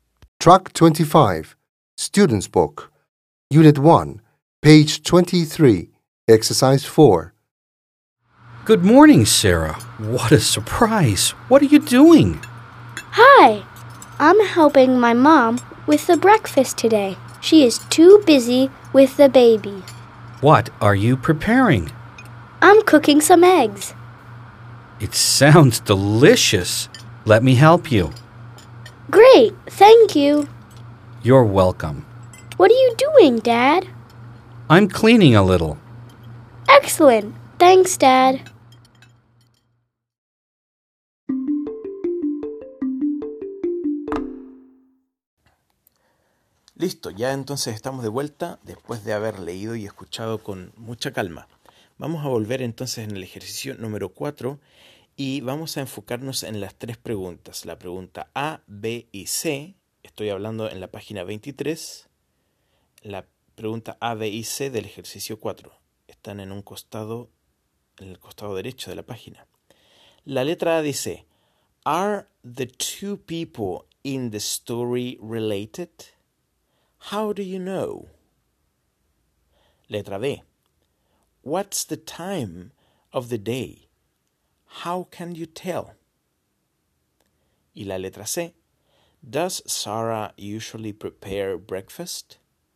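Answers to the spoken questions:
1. Yes, they are father and daughter (Sarah calls him Dad).
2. Morning (they say good morning and are making breakfast).
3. No, she is only helping today because her mom is busy with the baby.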